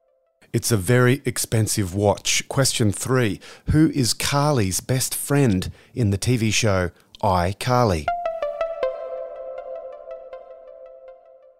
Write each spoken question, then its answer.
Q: Who is Carly's best friend in the TV show iCarly?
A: Sam Puckett.